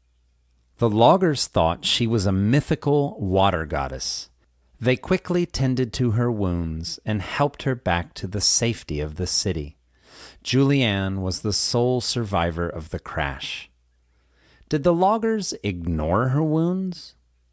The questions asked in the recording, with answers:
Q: Did the loggers ignore her wounds?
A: No, they didn't. They quickly tended to her wounds.